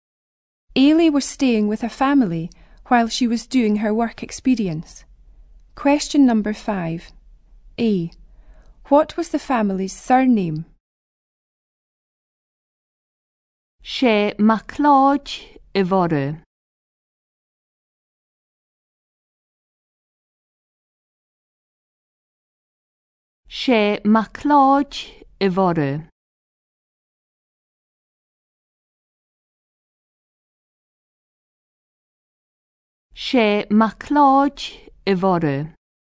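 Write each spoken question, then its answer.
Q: What was the family's surname?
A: MacLeod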